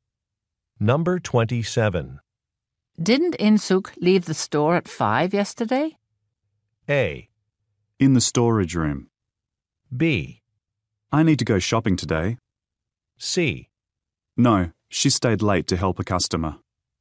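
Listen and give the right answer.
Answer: C: No, she stayed late to help a customer.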